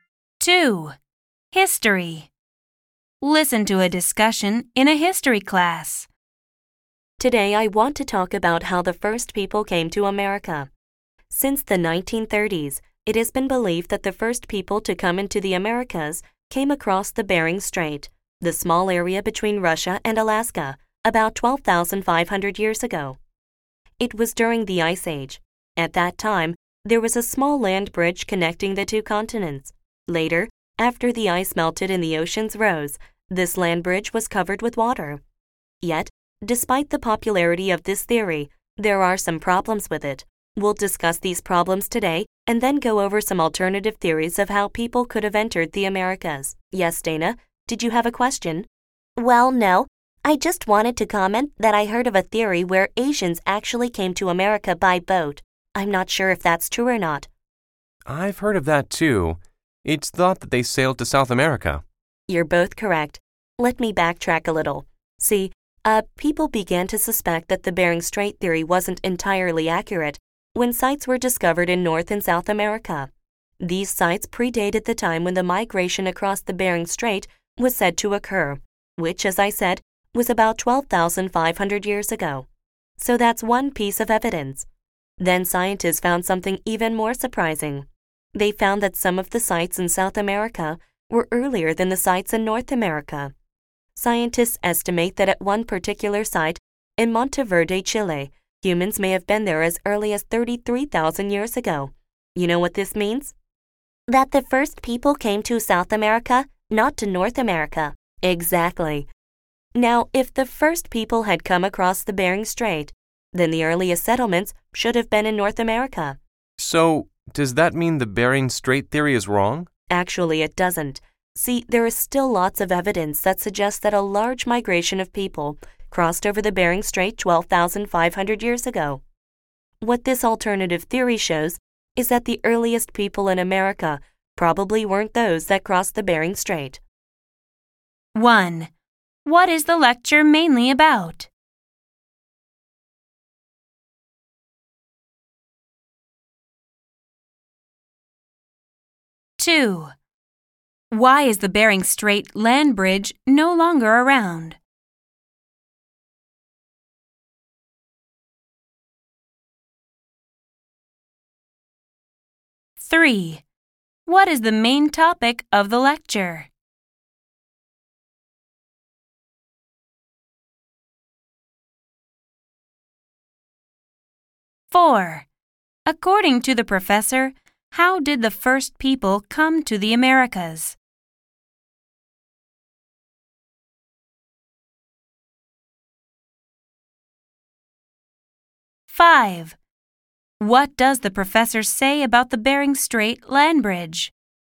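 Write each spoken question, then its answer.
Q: What is the lecture mainly about?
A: How the first people came to America, and theories about it

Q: Why is the Bering Strait land bridge no longer around?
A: The ice melted, the oceans rose and covered it with water

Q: What is the main topic of the lecture?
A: Theories of how the first people came to the Americas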